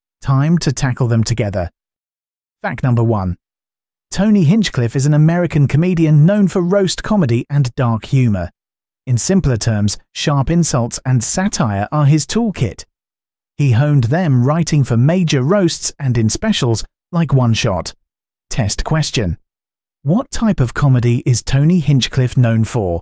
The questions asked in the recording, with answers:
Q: What type of comedy is Tony Hinchcliffe known for?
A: Correct answer, roast comedy.